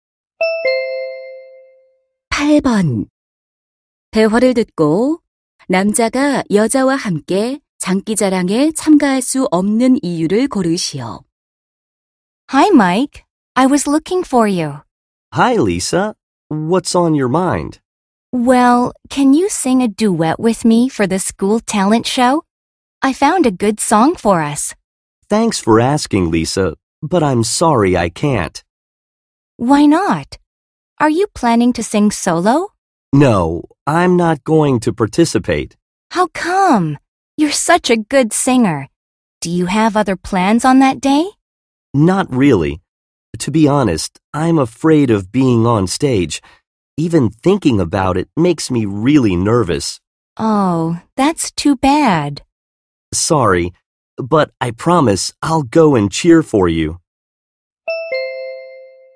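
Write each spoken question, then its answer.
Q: 대화를 듣고 남자가 여자와 함께 장기자랑에 참가할 수 없는 이유를 고르시오.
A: 무대에 서는 것이 두려워서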